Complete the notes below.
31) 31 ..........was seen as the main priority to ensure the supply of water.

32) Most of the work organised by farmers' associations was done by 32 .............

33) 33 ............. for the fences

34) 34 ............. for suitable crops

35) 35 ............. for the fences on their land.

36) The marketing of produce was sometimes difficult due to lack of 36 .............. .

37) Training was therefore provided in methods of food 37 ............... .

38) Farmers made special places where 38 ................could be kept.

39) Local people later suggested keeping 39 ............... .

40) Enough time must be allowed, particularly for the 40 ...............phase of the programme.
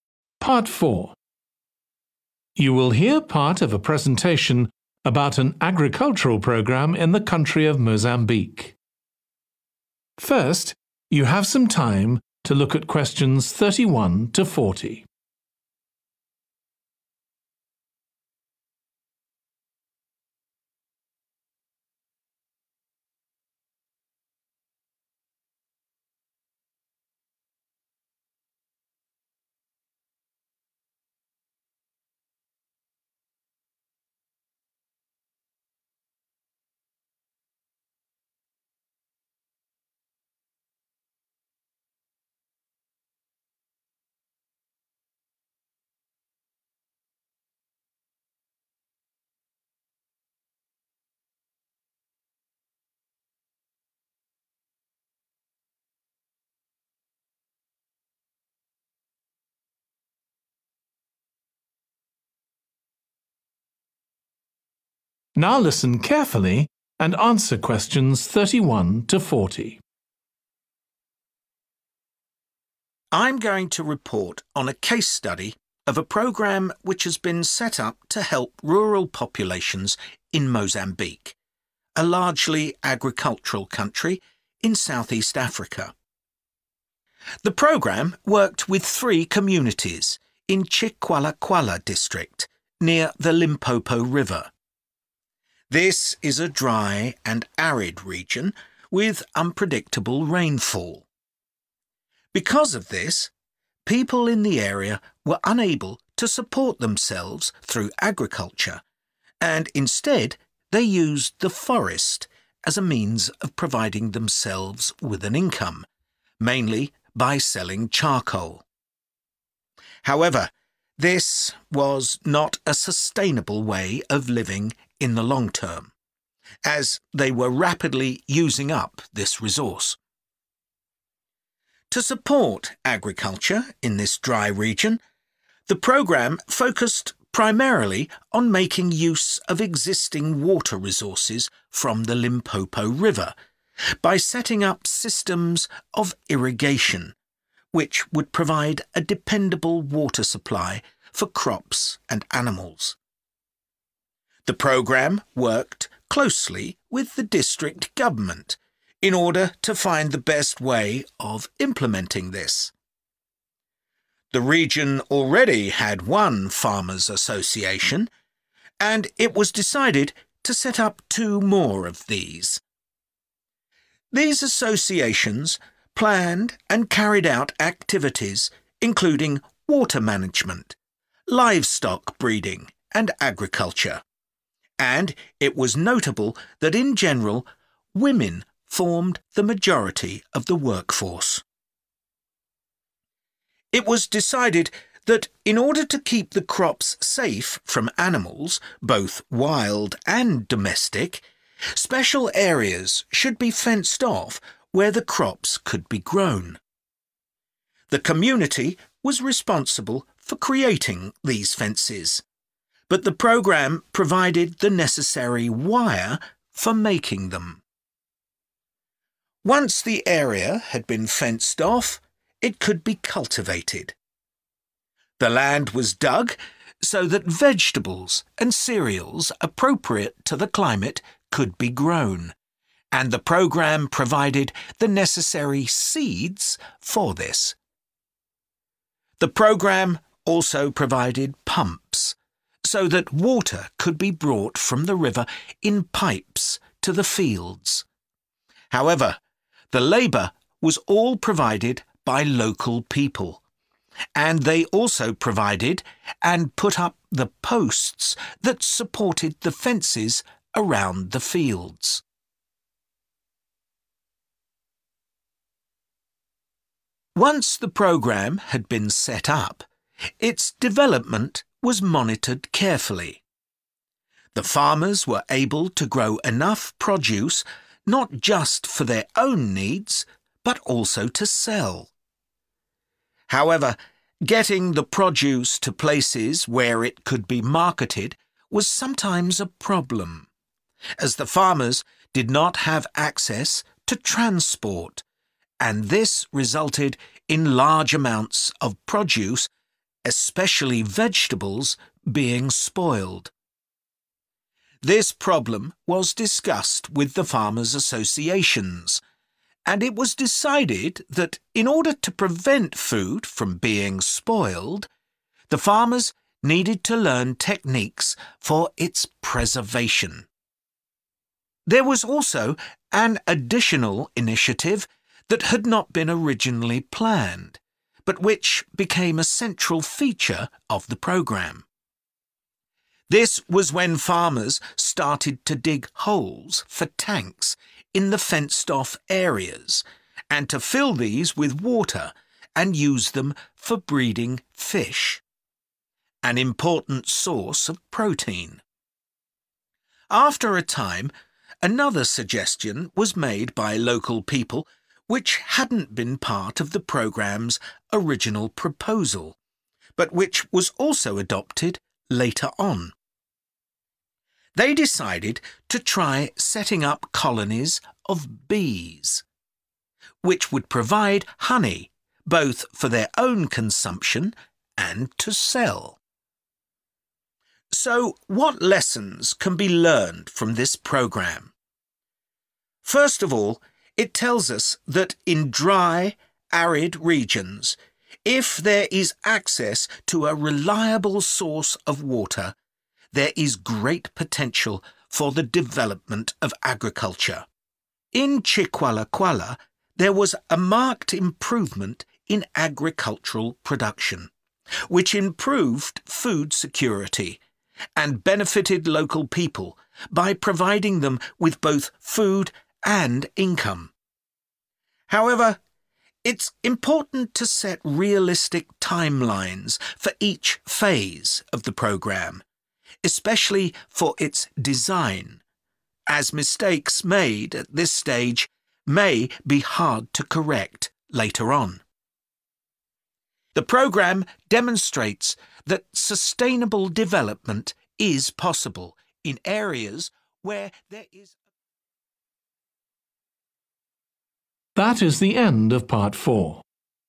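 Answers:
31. irrigation
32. women
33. wire
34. seeds
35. posts
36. transport
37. preservation
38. fish
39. bees
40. design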